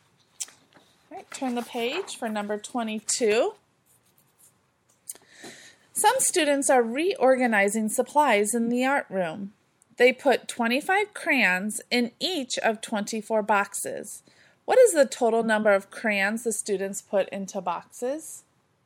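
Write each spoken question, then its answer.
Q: What is the total number of crayons the students put into boxes?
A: 600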